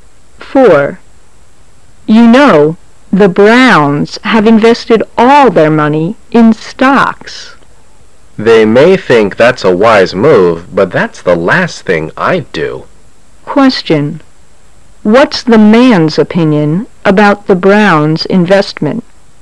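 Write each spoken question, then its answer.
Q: What's the man's opinion about the Browns' investment?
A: It's unwise; he would never put all his money in stocks

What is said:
[解析] W: You know, the Browns have invested all their money in stocks. M: They may think that's a wise move but that's the last thing I'd do. Q: What's the man's opinion about the Browns' investment?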